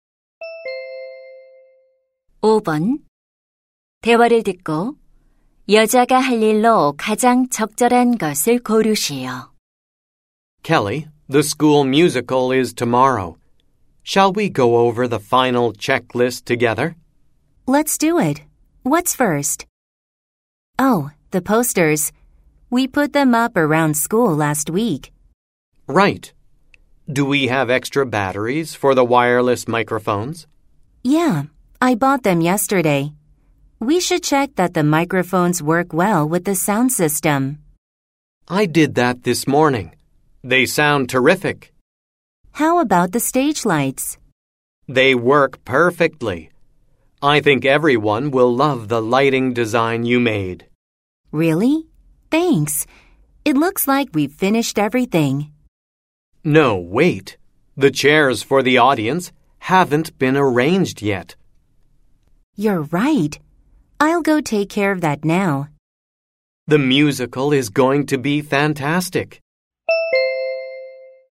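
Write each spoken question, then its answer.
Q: 대화를 듣고 여자가 할 일로 가장 적절한 것을 고르시오.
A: 관객용 의자 배치하기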